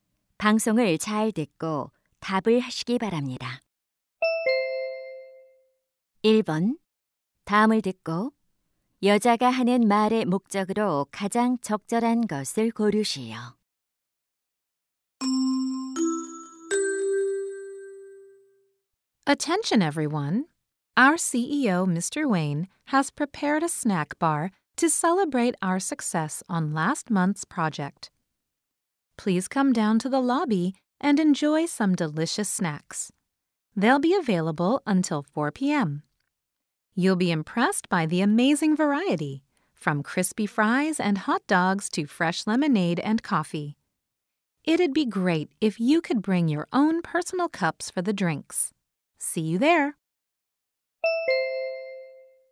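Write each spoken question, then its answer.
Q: 다음을 듣고 여자가 하는 말의 목적으로 가장 적절한 것을 고르시오.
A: 로비의 간식 코너에 오도록 안내하려고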